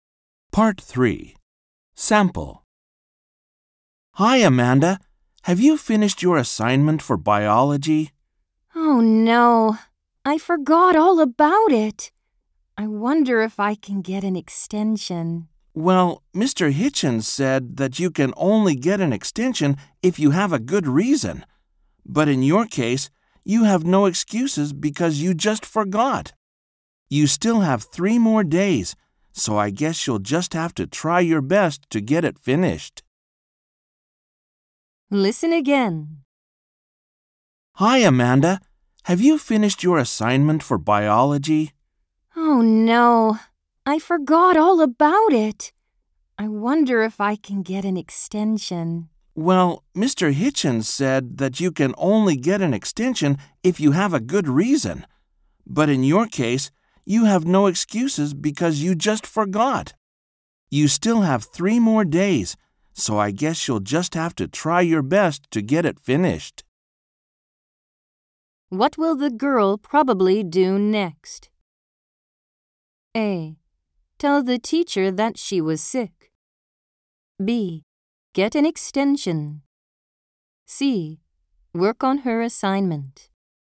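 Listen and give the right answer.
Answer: C: Work on her assignment.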